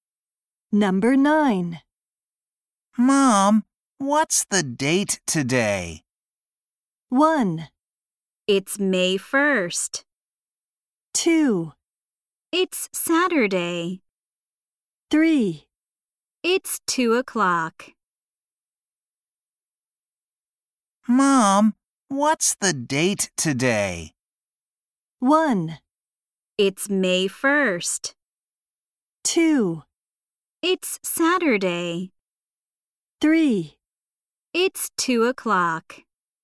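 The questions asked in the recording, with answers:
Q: Mom, what's the date today?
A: 1: It's May 1st.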